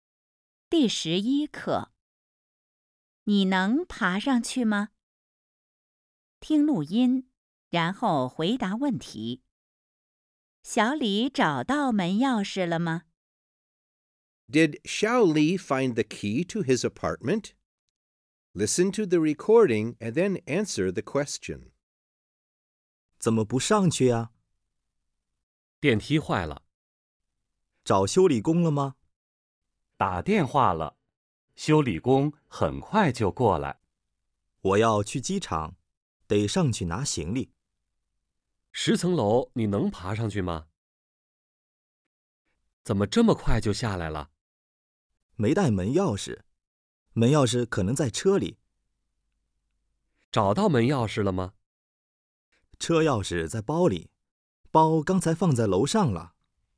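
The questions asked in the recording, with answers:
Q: 小李找到门钥匙了吗?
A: 没有找到。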